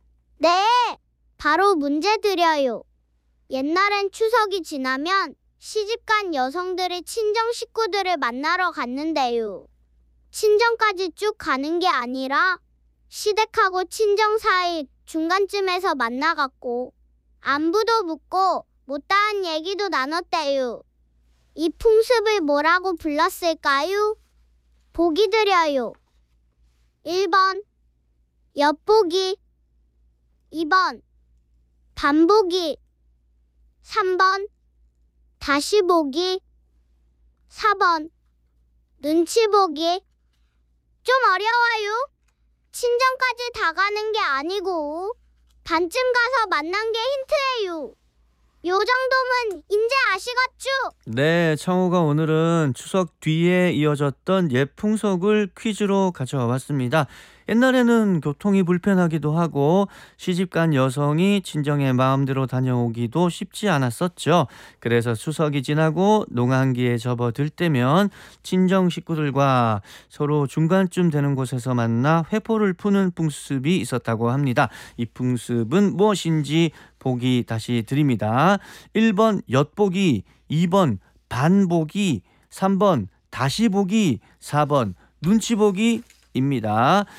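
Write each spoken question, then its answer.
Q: 이 풍습은 무엇인지 보기 다시 드립니다. 1번 엿보기, 2번 반보기, 3번 다시보기, 4번 눈치보기 입니다.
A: 2번: 반보기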